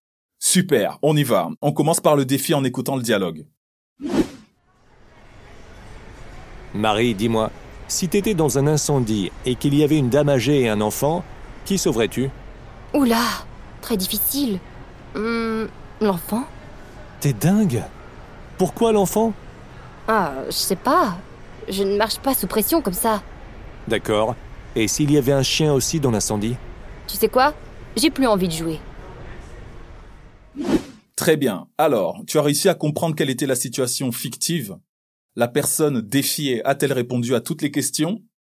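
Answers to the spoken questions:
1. Un incendie avec une dame âgée et un enfant : qui sauverais-tu ?
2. Non, elle n'a plus voulu jouer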